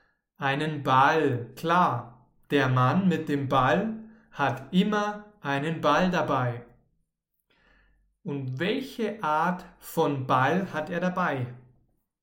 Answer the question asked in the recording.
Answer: Einen Fußball. Er hat immer einen Fußball dabei.